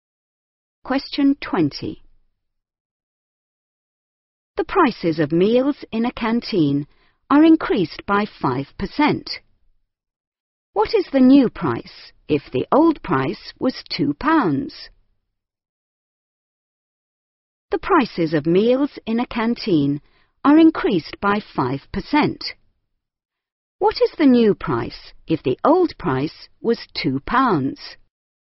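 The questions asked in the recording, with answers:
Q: What is the new price if the old price was £2?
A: £2.10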